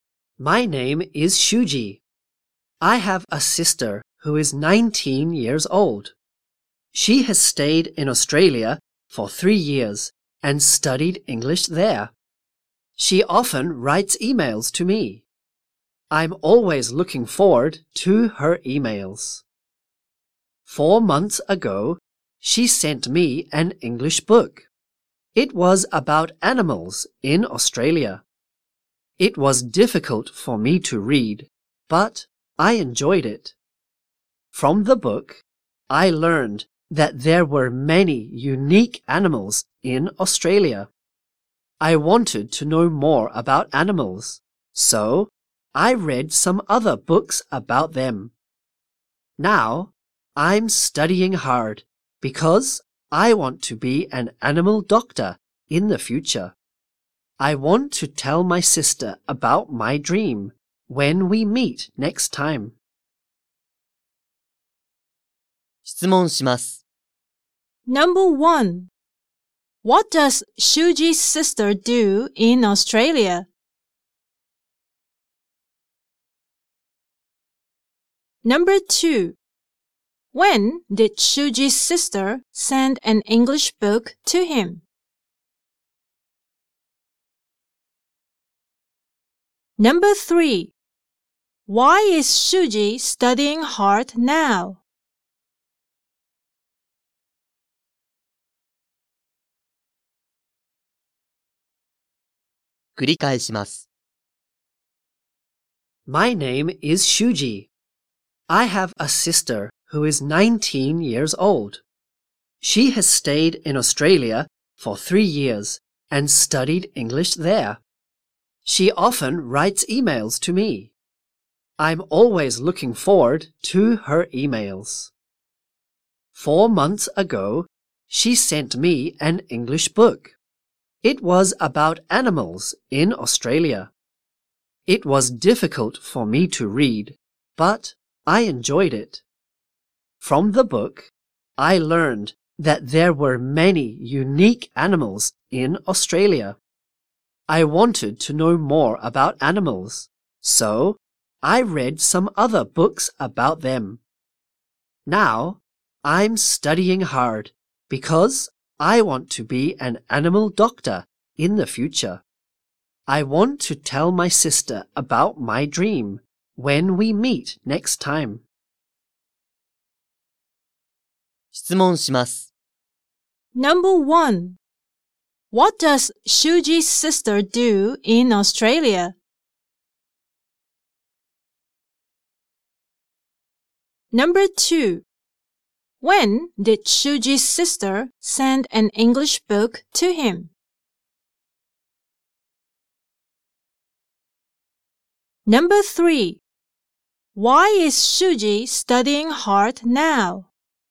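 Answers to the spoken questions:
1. She studies English.
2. 4 months ago.
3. Because he wants to be an animal doctor in the future.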